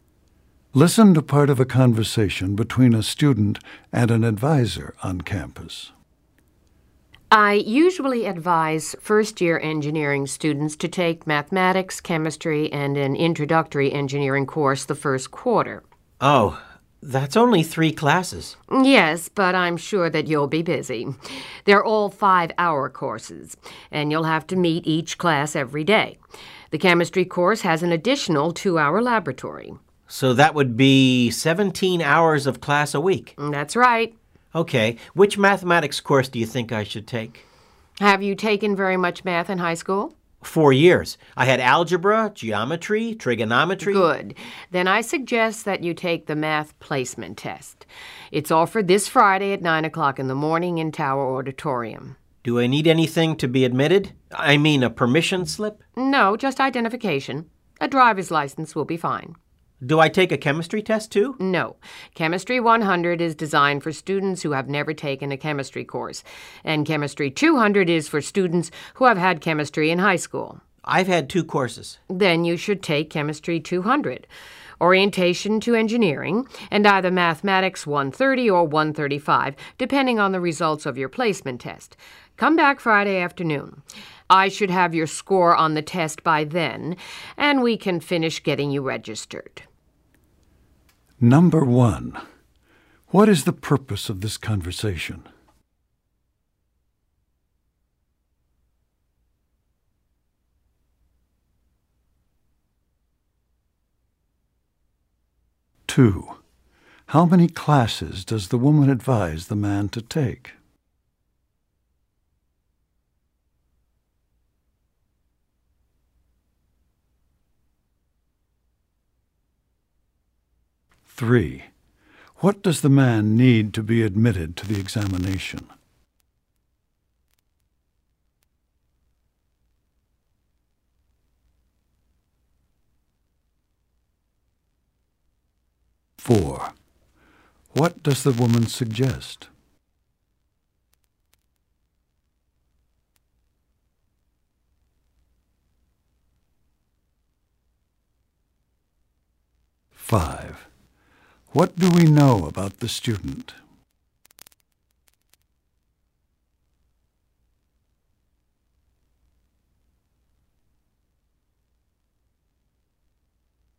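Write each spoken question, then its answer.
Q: How many classes does the woman advise the man to take?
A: Three

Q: What does the man need to be admitted to the examination?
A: Identification, such as a driver's license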